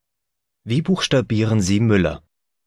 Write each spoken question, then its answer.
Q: Wie buchstabieren Sie Müller?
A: M-U-L-L-E-R.